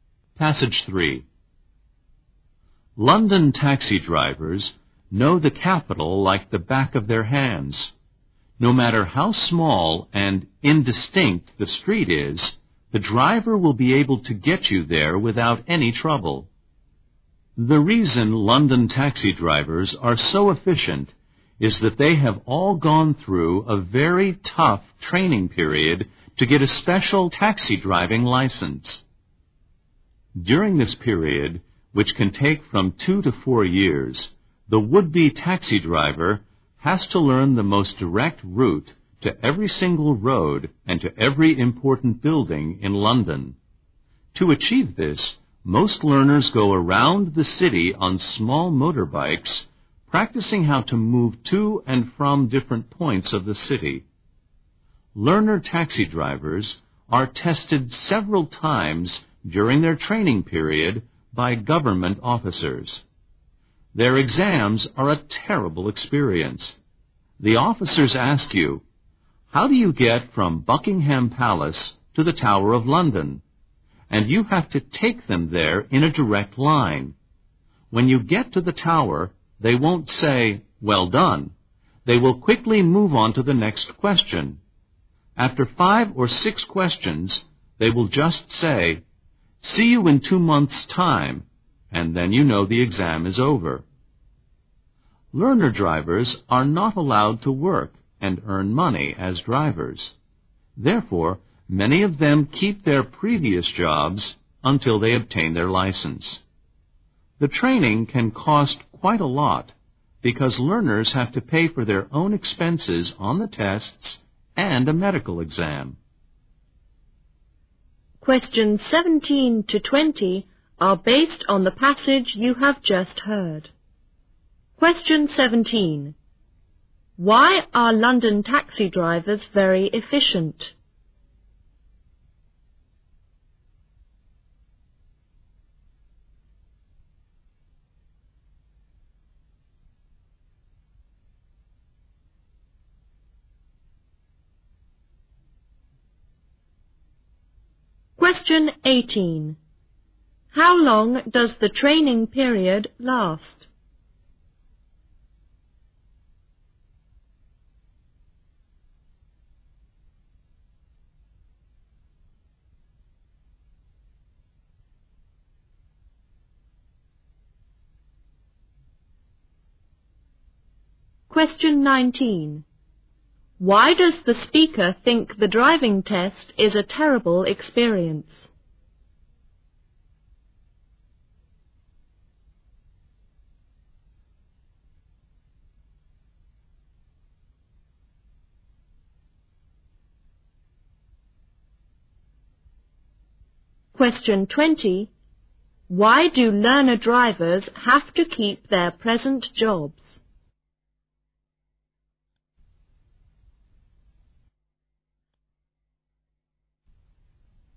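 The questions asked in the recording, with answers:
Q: Why are London taxi drivers very efficient?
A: They go through very tough training to get a special licence.

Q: How long does the training period last?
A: 2 to 4 years

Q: Why do learner drivers have to keep their present jobs?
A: They are not allowed to work as drivers, and the training is expensive.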